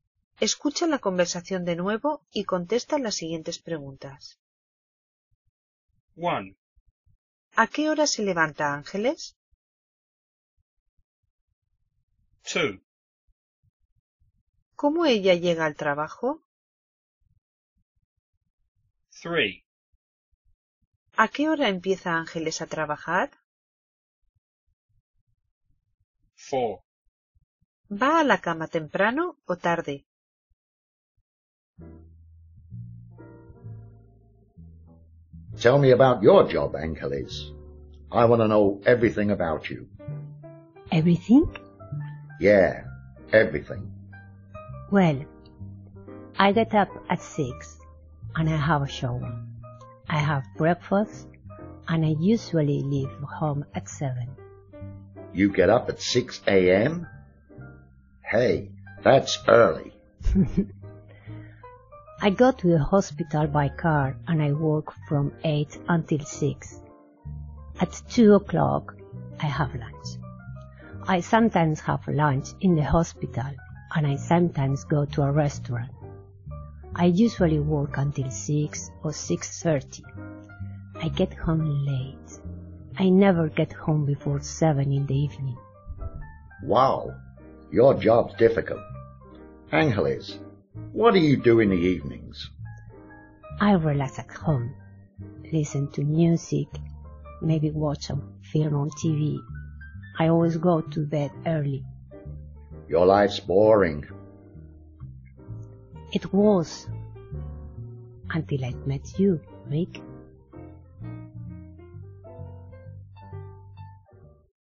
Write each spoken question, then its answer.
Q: ¿A qué hora se levanta Ángeles?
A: Se levanta a las 6.

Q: ¿Cómo ella llega al trabajo?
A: Voy al hospital en coche.

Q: ¿A qué hora empieza Ángeles a trabajar?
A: Ángeles empieza a las 8 de la mañana.

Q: ¿Va a la cama temprano o tarde?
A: Siempre voy a la cama temprano.